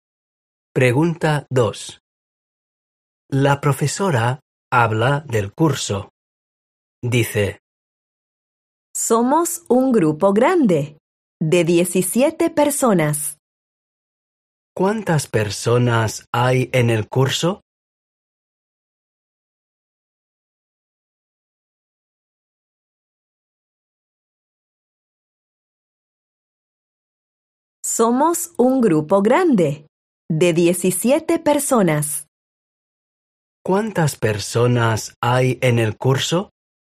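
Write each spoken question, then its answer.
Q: ¿Cuántas personas hay en el curso?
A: 17 personas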